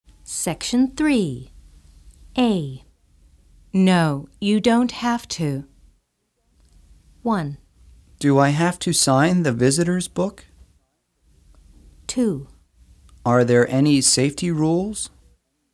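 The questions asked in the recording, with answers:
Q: No, you don't have to.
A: 1: Do I have to sign the visitor's book?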